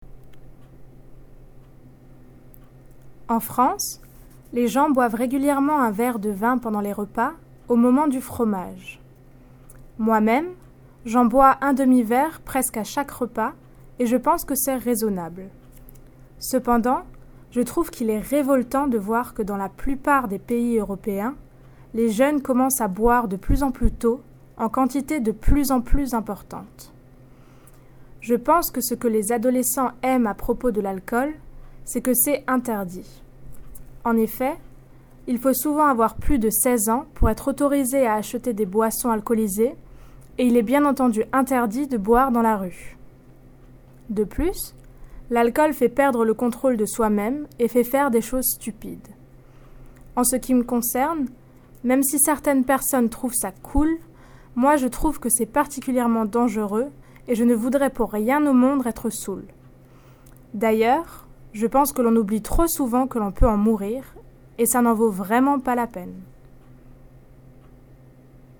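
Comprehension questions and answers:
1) When do French people regularly have a glass of wine? (1)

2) What does Sarah find distasteful? (2)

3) Why does she think that young people enjoy drinking? (3)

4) What opinion does she have regarding drinking?(2)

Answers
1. During meals, at the cheese course
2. That in most European countries young people start drinking earlier and earlier, in larger and larger quantities
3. Because it is forbidden (you often have to be over 16 to buy alcohol, drinking in the street is banned), and it makes you lose control and do stupid things
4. She thinks it is particularly dangerous, she would never want to be drunk; people forget you can die from it and it's not worth it

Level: Higher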